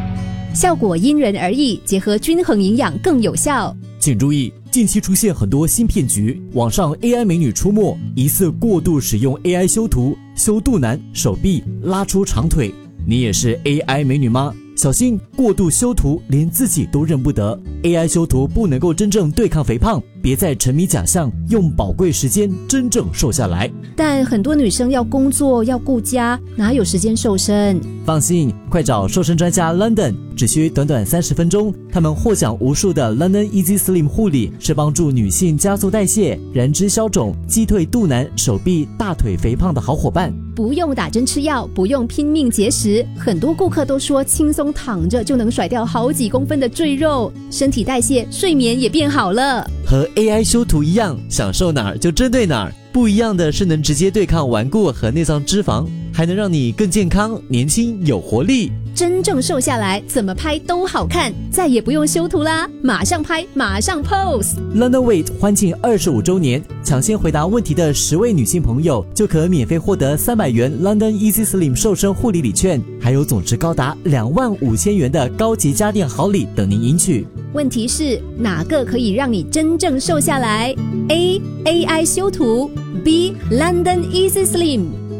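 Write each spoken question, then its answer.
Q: 问题是哪个可以让你真正瘦下来 ?A AI 修图 ,B London Easy Slim。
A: B: London Easy Slim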